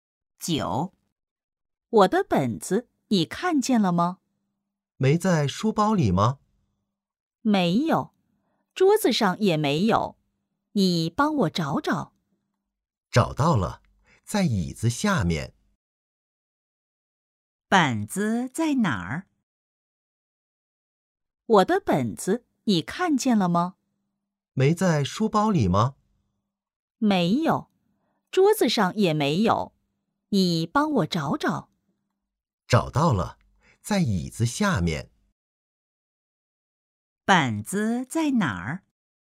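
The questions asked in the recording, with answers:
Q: 本子在哪儿?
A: 在椅子下面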